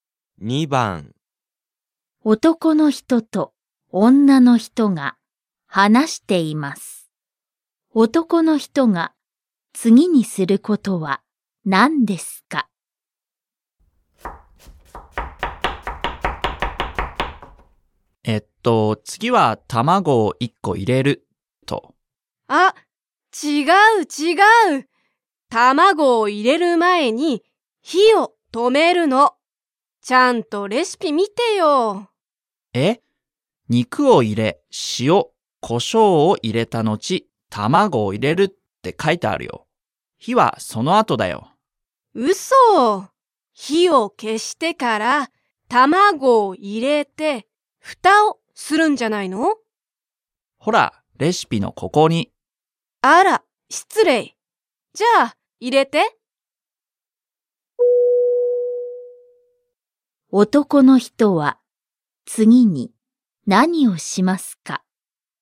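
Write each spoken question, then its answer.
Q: 男の人は次に何をしますか?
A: 卵を入れる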